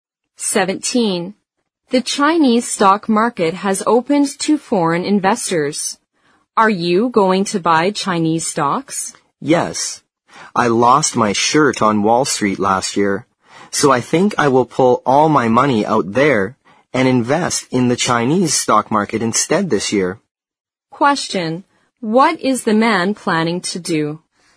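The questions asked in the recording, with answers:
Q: What is the man planning to do?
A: Move his money out of Wall Street and invest it in the Chinese stock market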